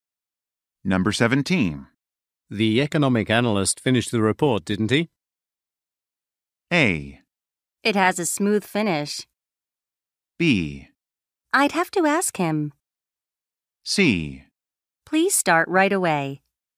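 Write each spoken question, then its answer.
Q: The economic analyst finished the report, didn't he?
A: B: I'd have to ask him.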